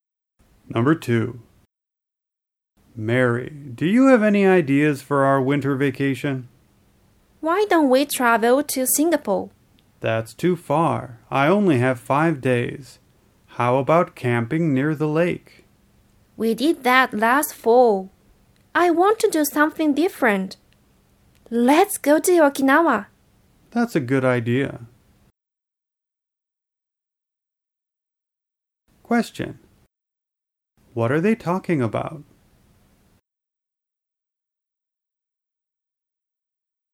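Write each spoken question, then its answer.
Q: What are they talking about?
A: Their plans for winter vacation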